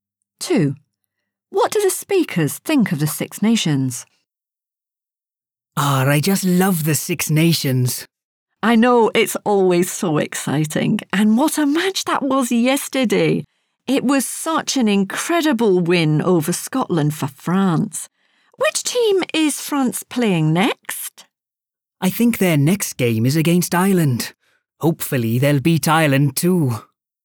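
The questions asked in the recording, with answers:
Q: What do the speakers think of the Six Nations?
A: They love it; it's always exciting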